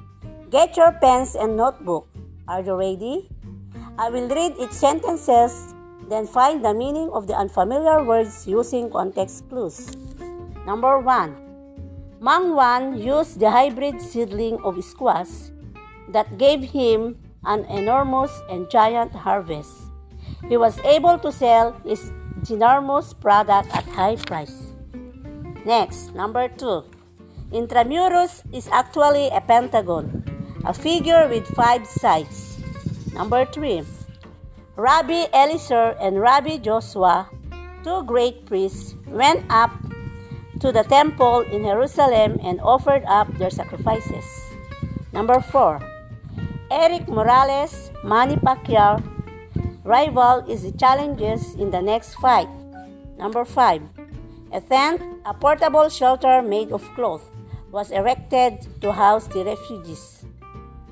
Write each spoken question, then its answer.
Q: find the meaning of the unfamiliar words using context clues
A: Yes, ginormous means giant and enormous.

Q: find the meaning of the unfamiliar words using context clues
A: Correct. Pentagon means figure with five sides.

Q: find the meaning of the unfamiliar words using context clues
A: Very good. Rabbi means priest.

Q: find the meaning of the unfamiliar words using context clues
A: Excellent. Tent means shelter.